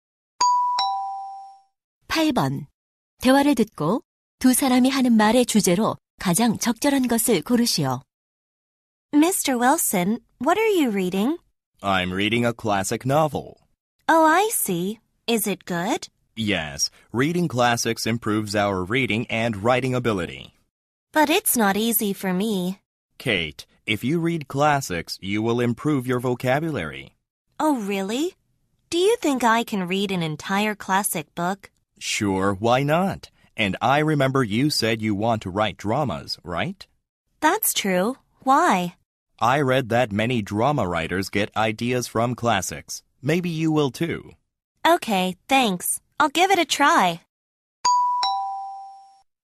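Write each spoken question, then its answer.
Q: 대화를 듣고 두 사람이 하는 말의 주제로 가장 적절한 것을 고르시오.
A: 고전 읽기의 이점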